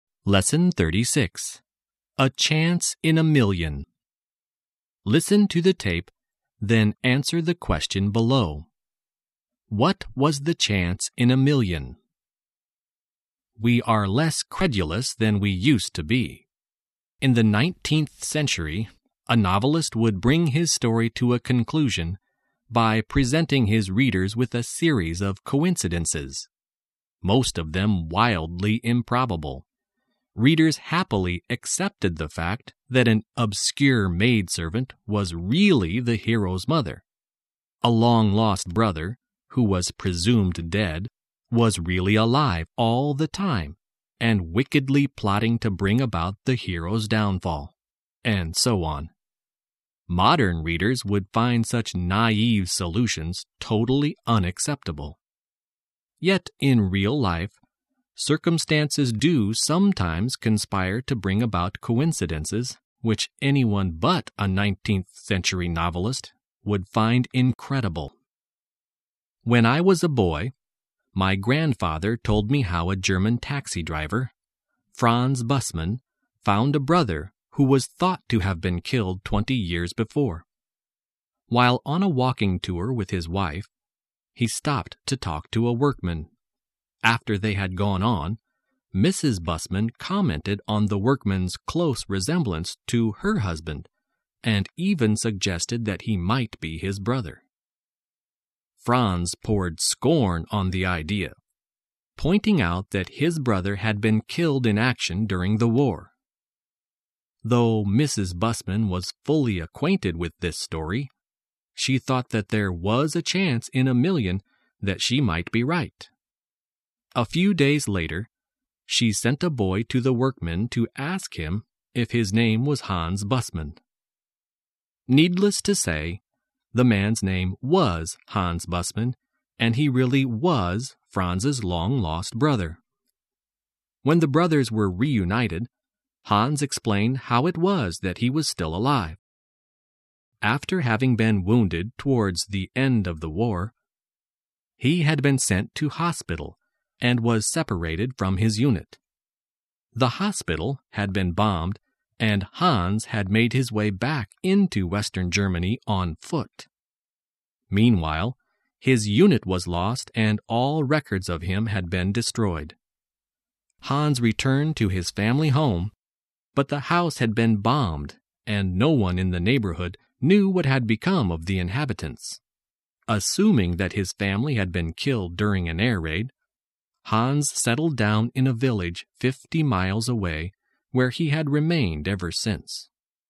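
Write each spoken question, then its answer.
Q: What was the chance in a million?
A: That the workman who looked like Franz was really his long-lost brother Hans, who was thought to have been killed in the war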